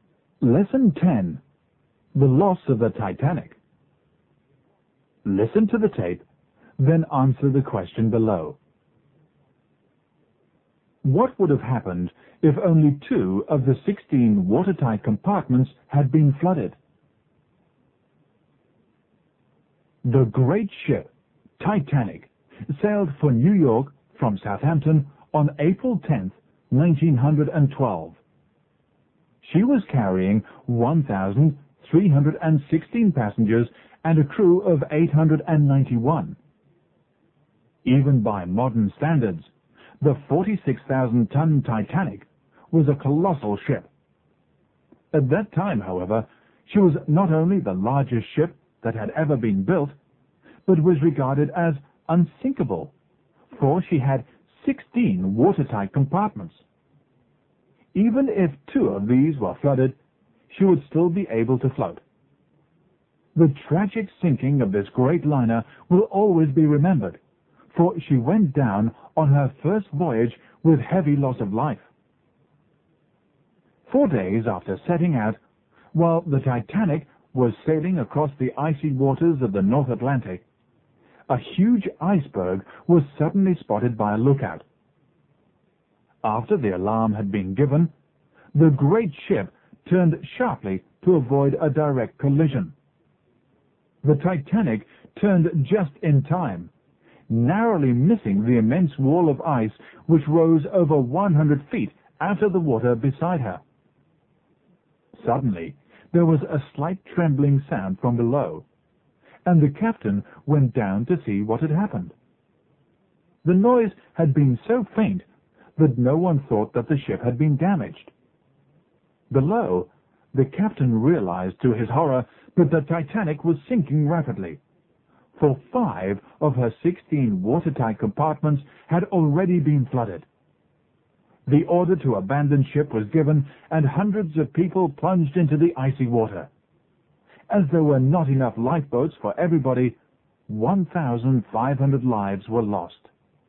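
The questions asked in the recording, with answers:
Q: What would have happened if only 2 of the 16 watertight compartments had been flooded?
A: She would still have been able to float.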